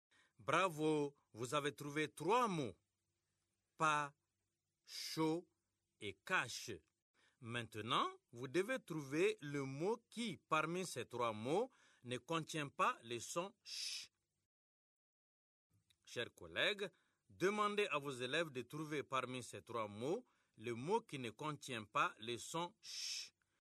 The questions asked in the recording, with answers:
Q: Maintenant, vous devez trouver le mot qui, parmi ces trois mots, ne contient pas le son « ch ».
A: C'est le mot pas.